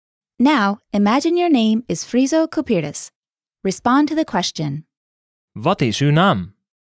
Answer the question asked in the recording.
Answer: Mijn naam is Friso Kupiris.